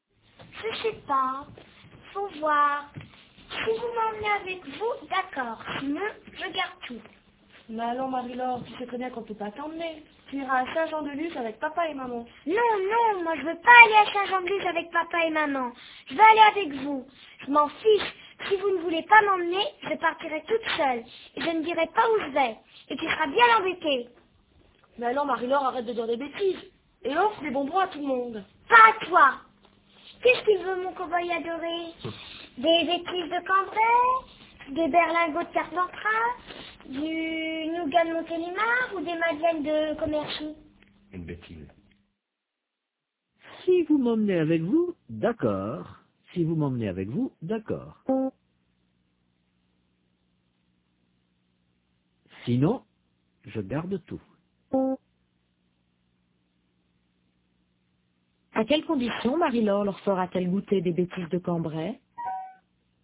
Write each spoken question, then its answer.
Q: À quelles conditions Marie-Laure leur fera-t-elle goûter des bêtises de Cambrai ?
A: À condition qu'ils l'emmènent avec eux.